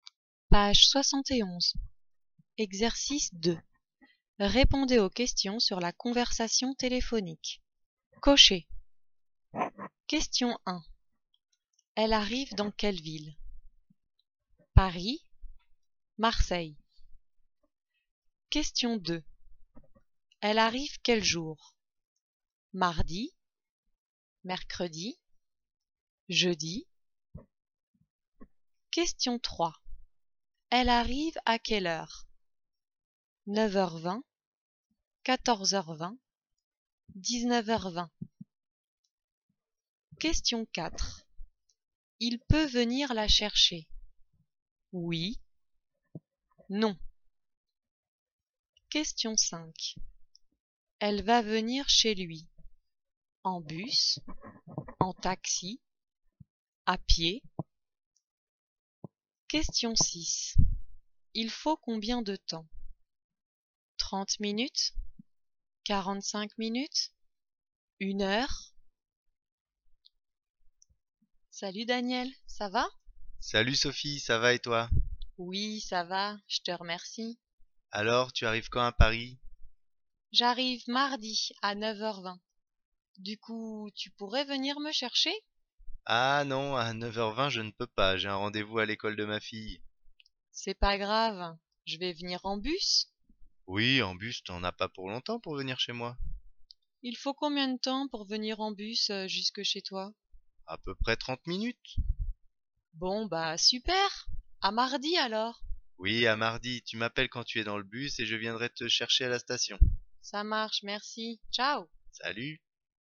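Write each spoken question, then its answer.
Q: Elle arrive dans quelle ville?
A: Paris

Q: Elle arrive quel jour?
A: Mardi

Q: Elle arrive à quelle heure?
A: 9h20

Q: Il peut venir la chercher?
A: Non

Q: Elle va venir chez lui?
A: En bus

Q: Il faut combien de temps?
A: 30 minutes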